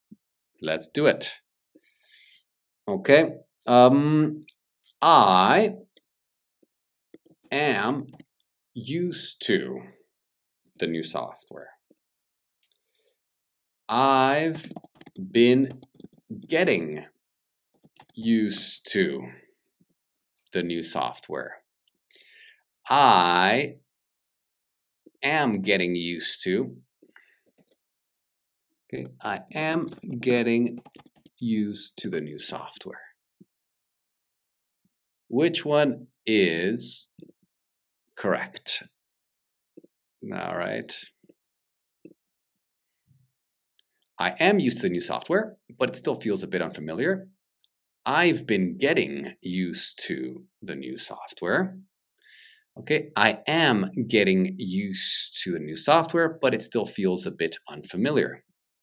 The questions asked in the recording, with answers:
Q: Which one is correct? All right.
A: I am getting used to.